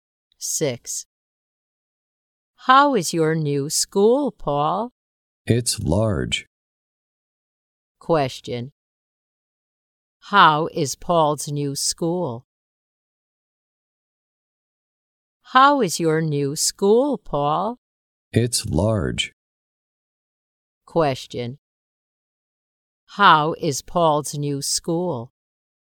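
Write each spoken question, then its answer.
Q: How is Paul's new school?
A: It's large.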